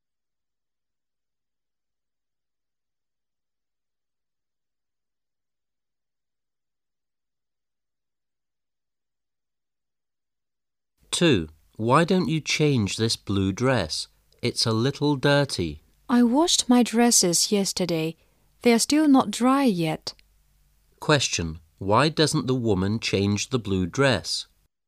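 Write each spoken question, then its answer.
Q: why doesn't the woman change the blue dress?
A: Her other dresses are not dry yet

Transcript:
[解析] M: Why don't you change this blue dress? It's a little dirty. W: I washed my dresses yesterday. They are still not dry yet. Q: Why doesn't the woman change the blue dress?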